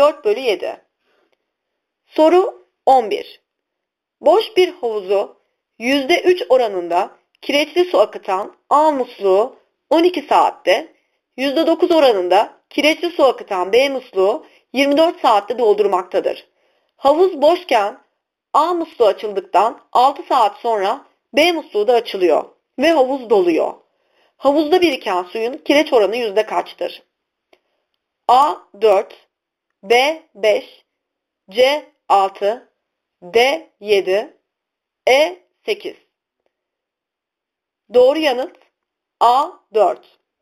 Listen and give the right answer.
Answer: Doğru yanıt A 4.